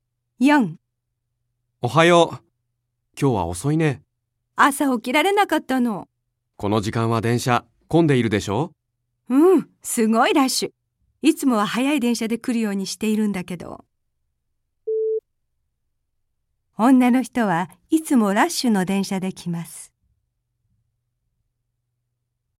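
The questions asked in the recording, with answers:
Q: 女の人はいつもラッシュの電車で来ます。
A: ×(いつもは早い電車)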